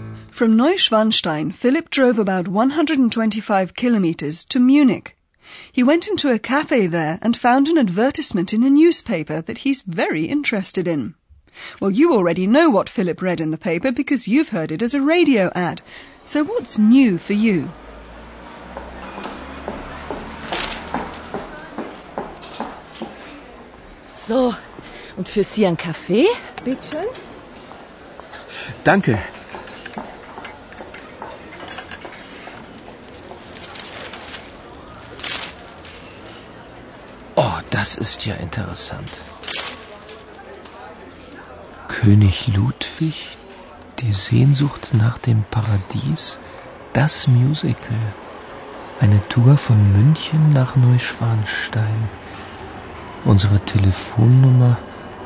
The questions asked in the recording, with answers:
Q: So what's new for you?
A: What's new to you is that a tour is offered from Munich to Neuschwanstein Castle.